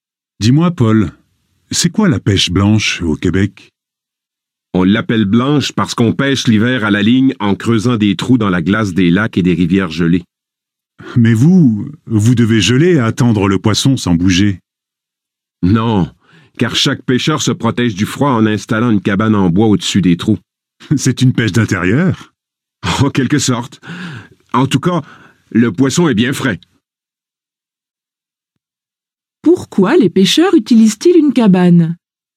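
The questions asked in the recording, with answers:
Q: Pourquoi les pêcheurs utilisent-ils une cabane?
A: Pour se protéger du froid.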